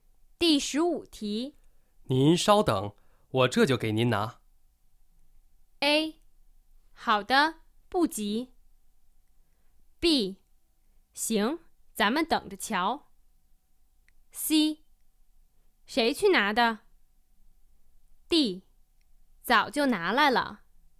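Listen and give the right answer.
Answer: A: 好的,不急。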